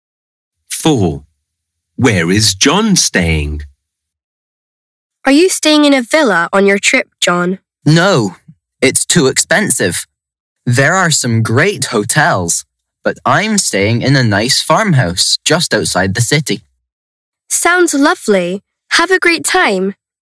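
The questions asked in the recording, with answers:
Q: Where is John staying?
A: In a farmhouse just outside the city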